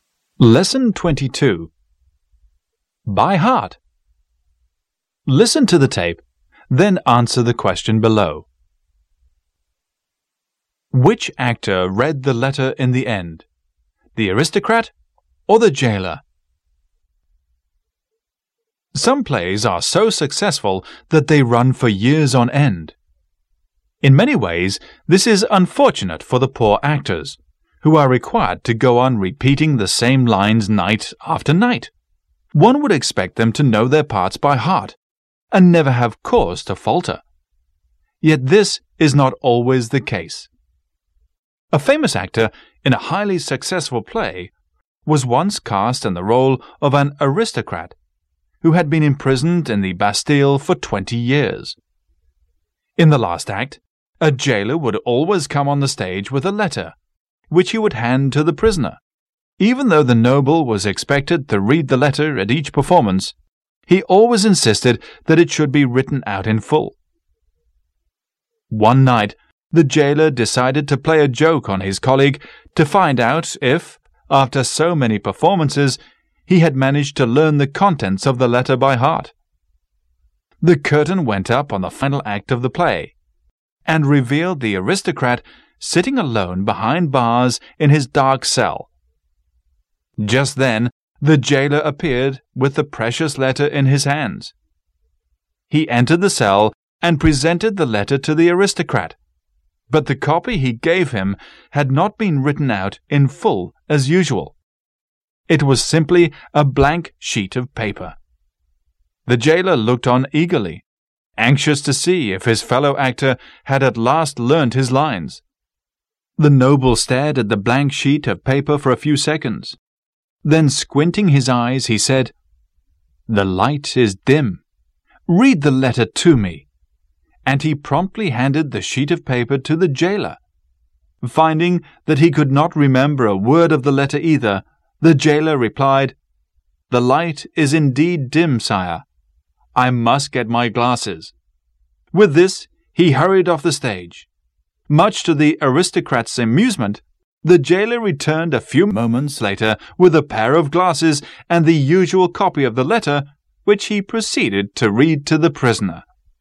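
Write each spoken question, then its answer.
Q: Which actor read the letter in the end?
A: The jailer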